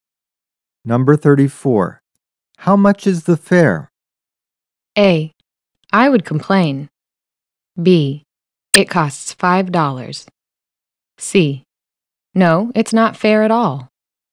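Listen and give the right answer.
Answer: B: It costs $5.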